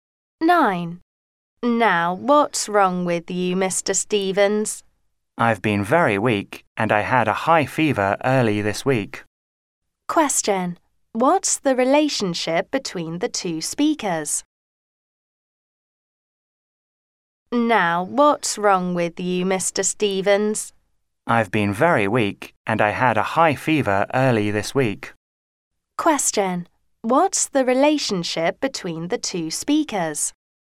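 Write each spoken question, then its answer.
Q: What's the relationship between the two speakers?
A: Doctor and patient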